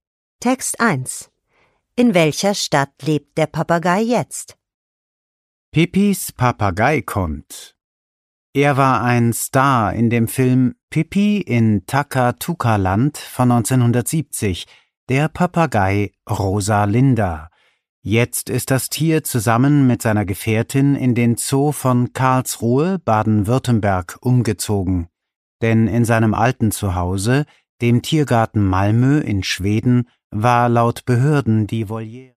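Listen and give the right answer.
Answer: In Karlsruhe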